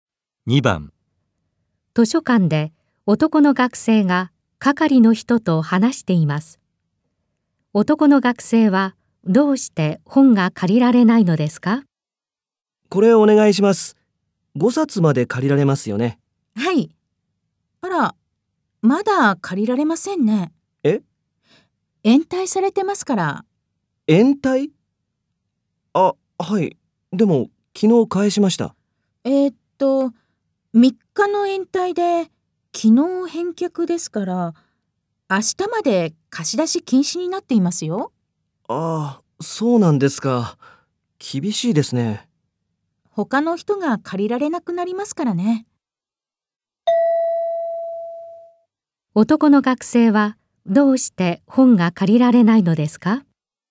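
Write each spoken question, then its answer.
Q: 男の学生はどうして本が借りられないのですか?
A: 本を3日延滞して昨日返したので、明日まで貸し出し禁止だから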